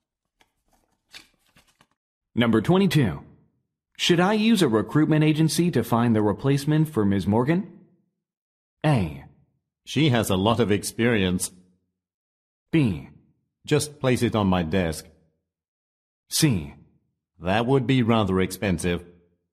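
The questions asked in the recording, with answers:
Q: Should I use a recruitment agency to find the replacement for Ms.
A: C: That would be rather expensive.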